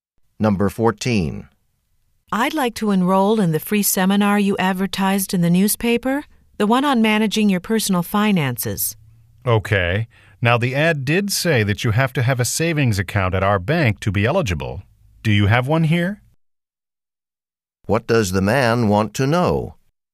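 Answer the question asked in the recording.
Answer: Whether she has a savings account at the bank.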